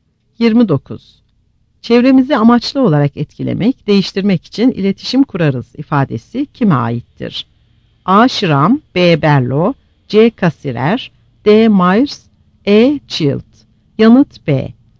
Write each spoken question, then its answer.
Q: Çevremizi amaçlı olarak etkilemek, değiştirmek için iletişim kurarız ifadesi kime aittir?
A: Yanıt B.